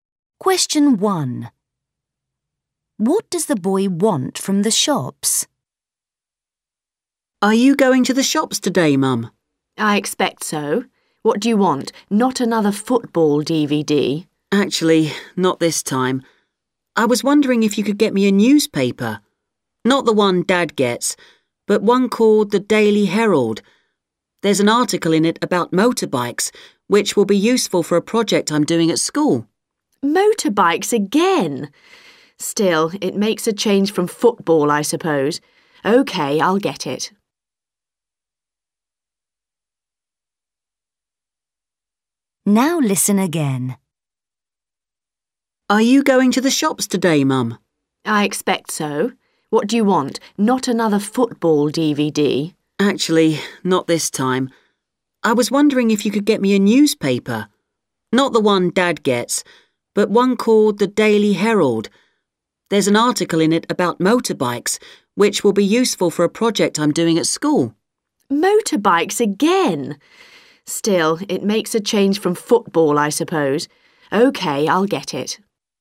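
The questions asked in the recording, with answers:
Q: What does the boy want from the shops?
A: a newspaper (the Daily Herald)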